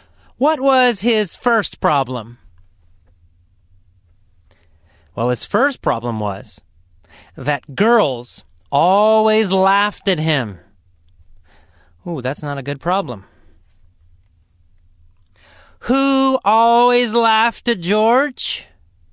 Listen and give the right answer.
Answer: Girls. All girls. All women.